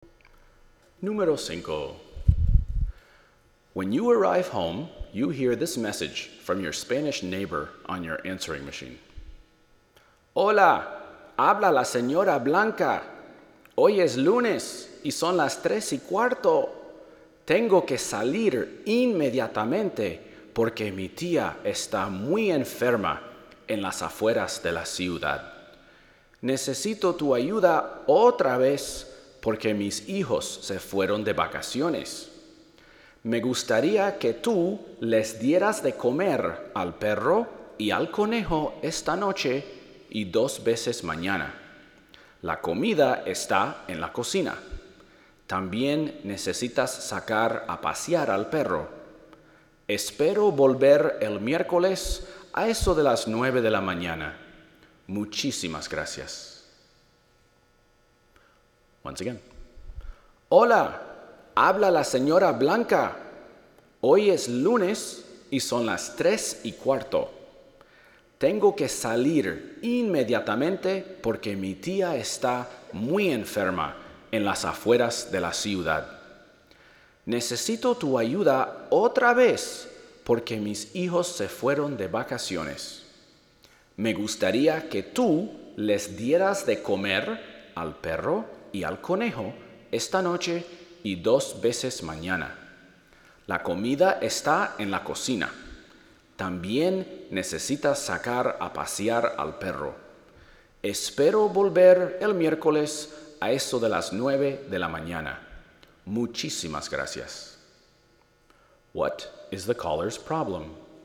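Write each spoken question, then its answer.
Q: What is the caller's problem?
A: She must leave immediately because her aunt is very ill outside the city.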